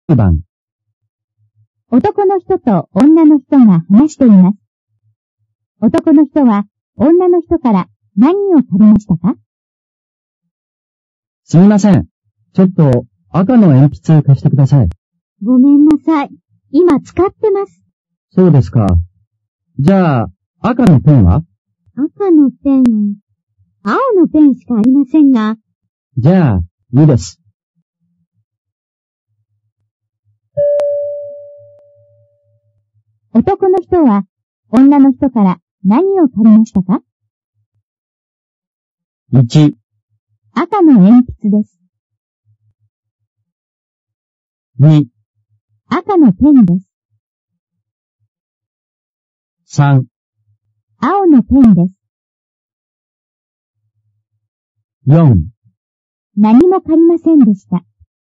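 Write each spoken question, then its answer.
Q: 男の人は女の人から何を借りましたか?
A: 4: 何も借りませんでした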